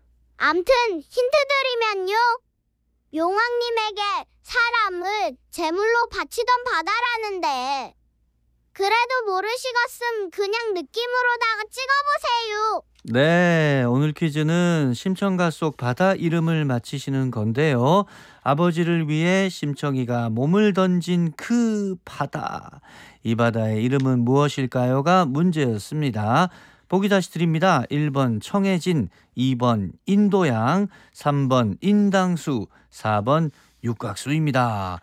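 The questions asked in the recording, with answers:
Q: 아버지를 위해 심청이가 몸을 던진 그 바다, 이 바다의 이름은 무엇일까요가 문제였습니다.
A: 3: 인당수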